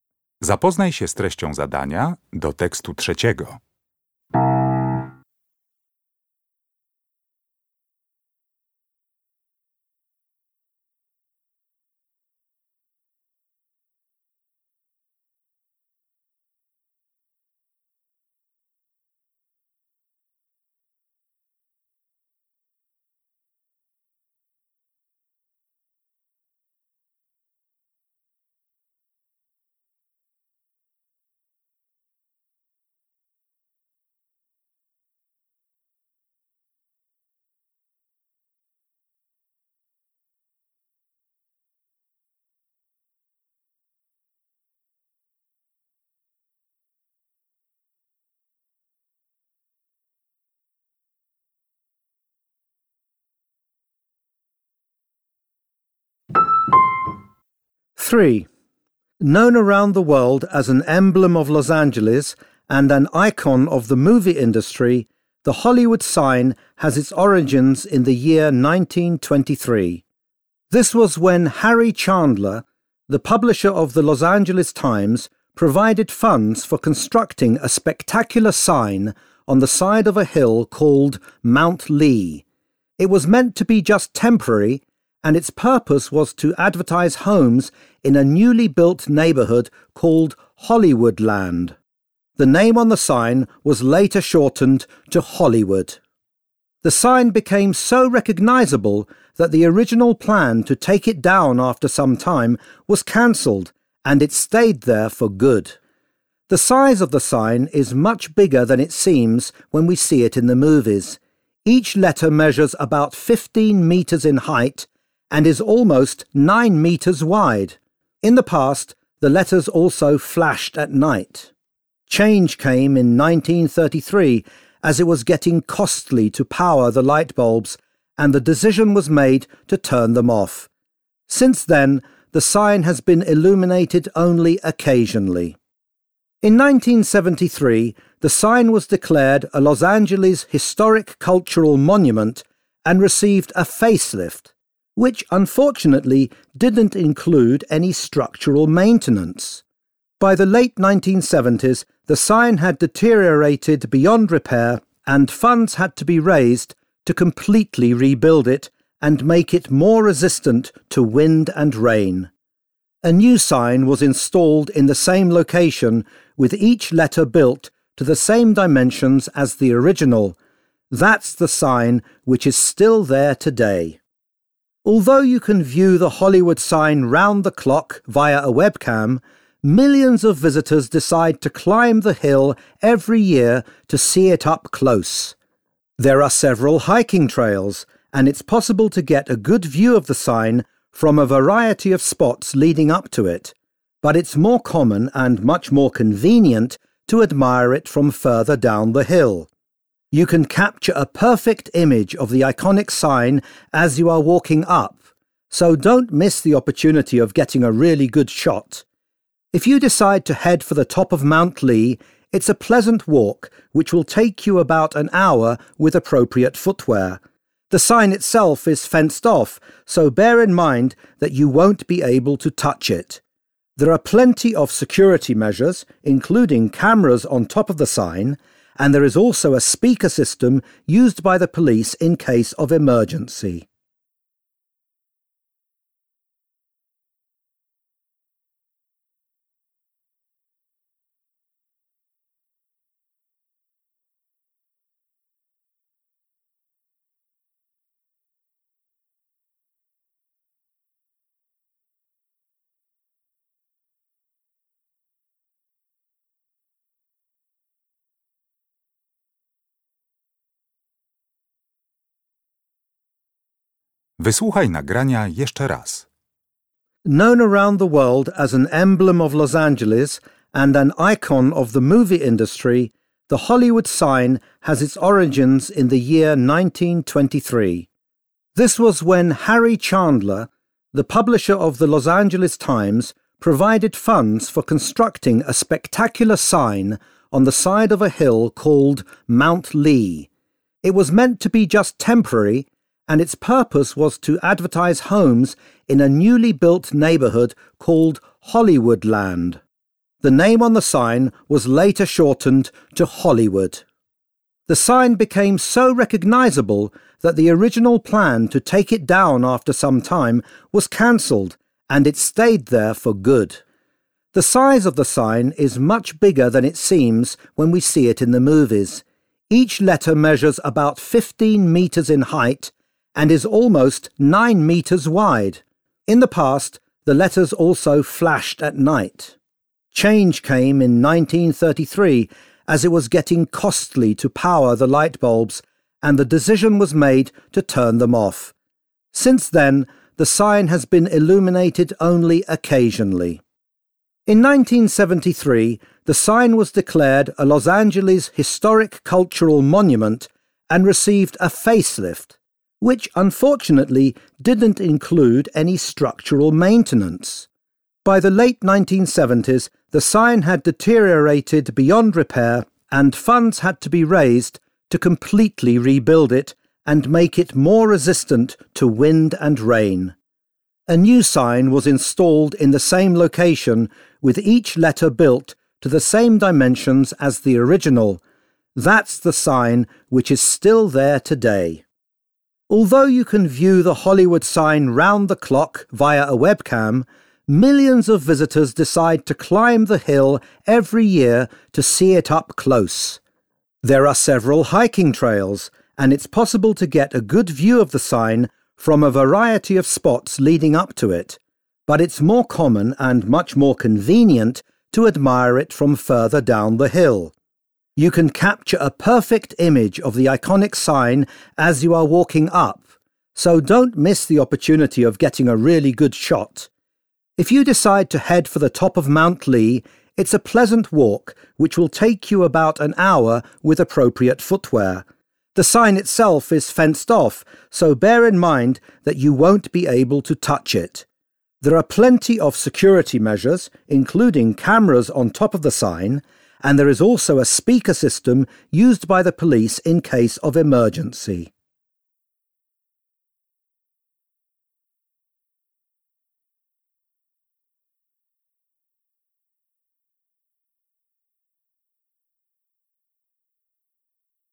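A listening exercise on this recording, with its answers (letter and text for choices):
W zadaniach 1.3.–1.6. zakreśl jedną z liter: A, B, C albo D.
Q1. The original Hollywood sign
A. was moved from a different location in 1923.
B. was meant to remain on the hillside permanently.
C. was initially an advert for the Los Angeles Times.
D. was intended to promote a housing development.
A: D. was intended to promote a housing development.

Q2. The speaker mentions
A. the year when the sign stopped flashing every night.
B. the specific occasions when the sign was illuminated.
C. the number of light bulbs installed in the sign.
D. the distance between the letters in the sign.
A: A. the year when the sign stopped flashing every night.

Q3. The Hollywood sign that can be seen today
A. has to be rebuilt in the near future.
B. is located higher up the hill than previously.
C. is more likely to be affected by the weather.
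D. contains letters of the same size as the earlier version.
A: D. contains letters of the same size as the earlier version.

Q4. When talking about visiting the area where the sign is located, the speaker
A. recommends climbing to the top of the hill for the best view.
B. describes his own experience of photographing the sign.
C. gives advice to people who would like to see the sign.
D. warns against breaking the hiking trail regulations.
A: C. gives advice to people who would like to see the sign.

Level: Poziom: rozszerzony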